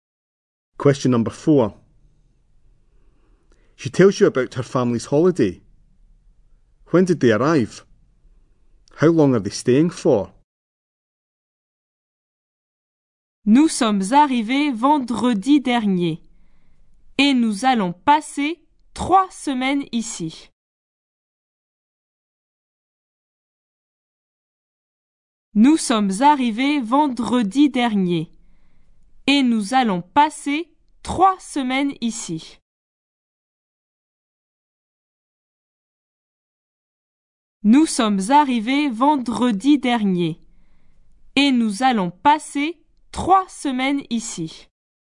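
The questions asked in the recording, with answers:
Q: When did they arrive?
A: Last Friday

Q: How long are they staying for?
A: 3 weeks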